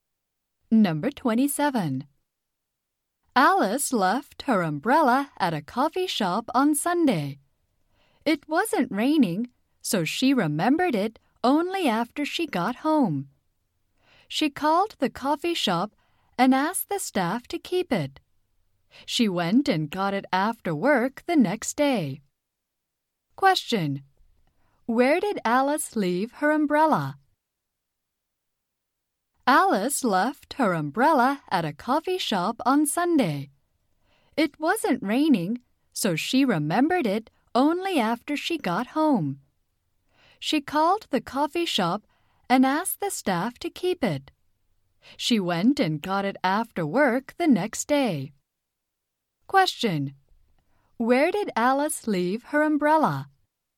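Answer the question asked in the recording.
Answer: At a coffee shop.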